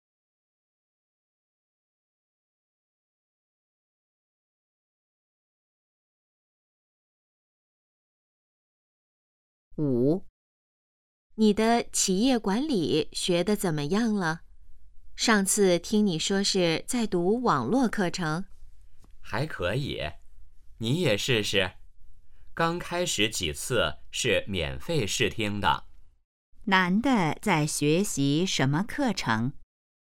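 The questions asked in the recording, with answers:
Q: 男的在学习什么课程?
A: 企业管理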